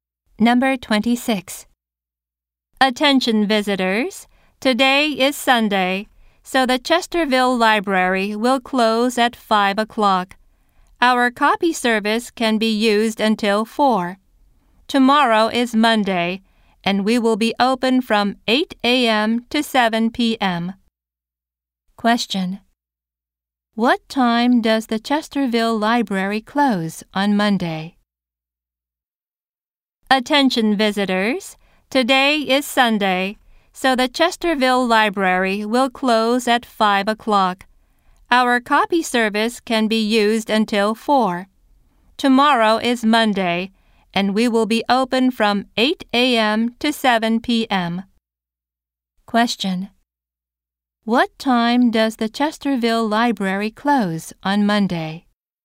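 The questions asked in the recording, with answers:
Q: What time does the Chesterville Library close on Monday?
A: At 7 p.m.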